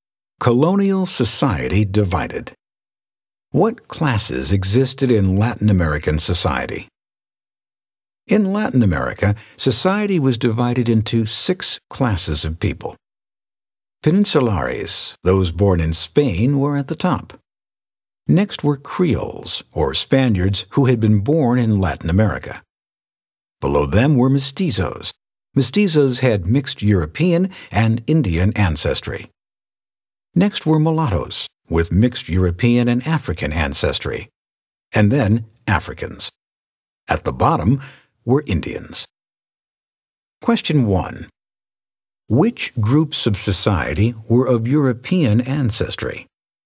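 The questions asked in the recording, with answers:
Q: Which groups of society were of European ancestry?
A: Peninsulares and Creoles (mestizos and mulattoes had partly European ancestry)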